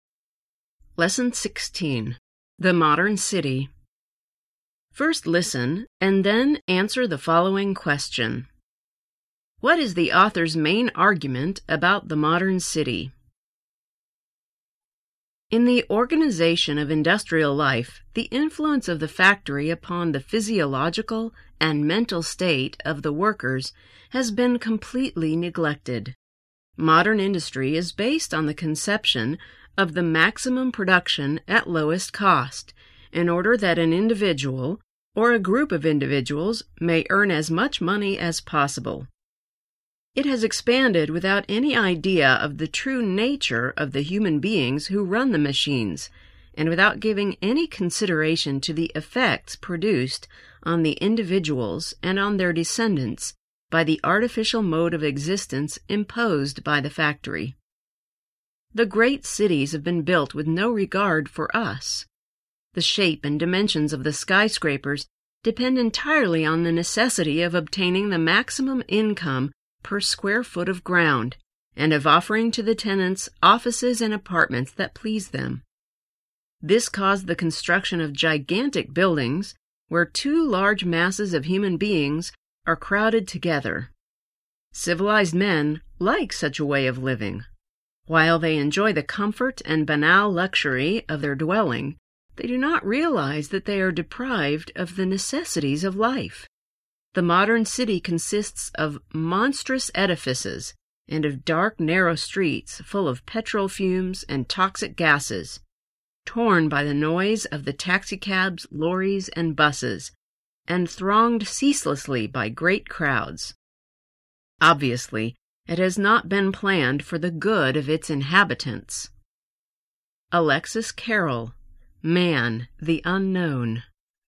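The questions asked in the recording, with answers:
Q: What is the author's main argument about the modern city?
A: The modern city was built for maximum profit with no regard for the health and well-being of its inhabitants.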